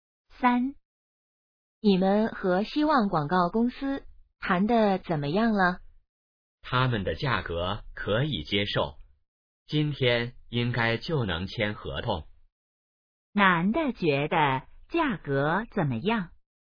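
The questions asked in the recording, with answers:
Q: 男的觉得价格怎么样?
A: 可以接受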